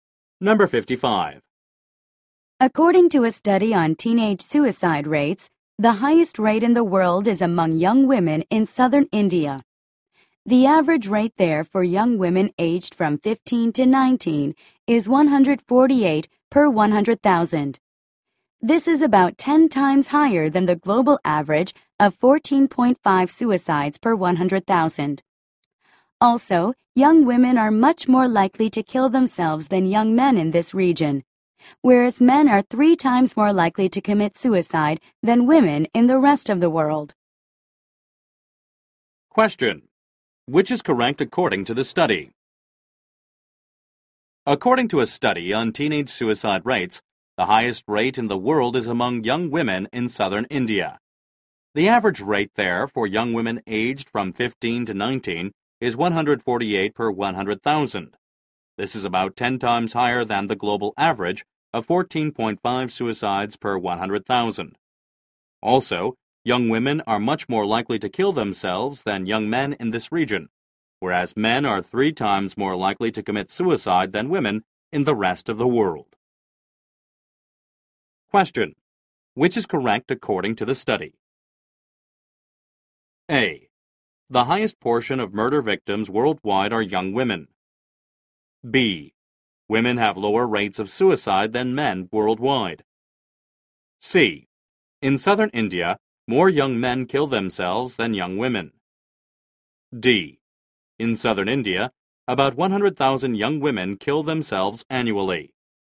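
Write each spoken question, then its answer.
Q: Which is correct according to the study?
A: B: Women have lower rates of suicide than men worldwide.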